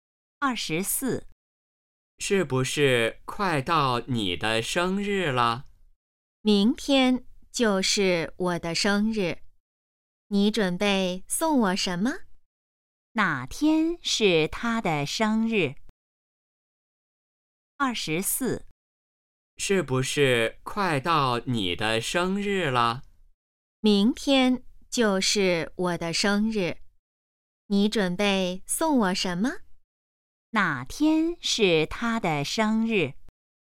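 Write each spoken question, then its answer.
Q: 哪天是他的生日?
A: 明天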